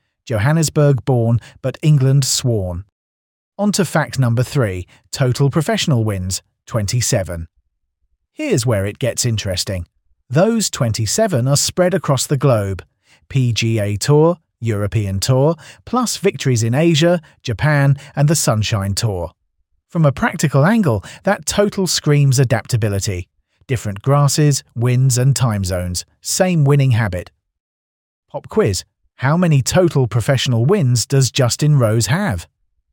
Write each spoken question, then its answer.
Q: How many total professional wins does Justin Rose have?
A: Correct answer, 27.